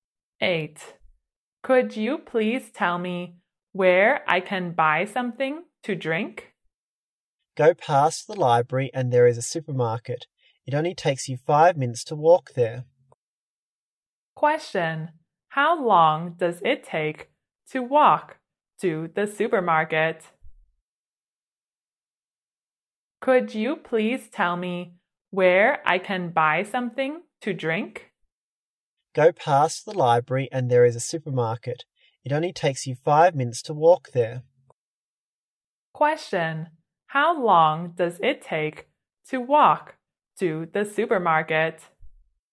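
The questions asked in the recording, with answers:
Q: Question, how long does it take to walk to the supermarket?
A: 5 minutes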